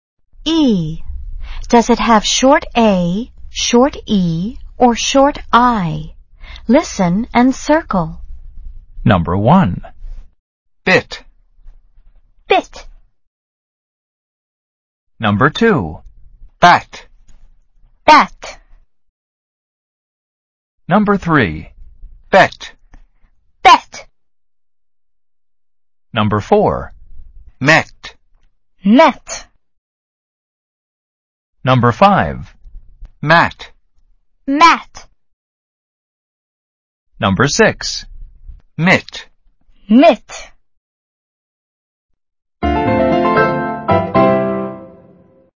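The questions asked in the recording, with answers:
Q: Matt.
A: short A

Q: Mitt.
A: short I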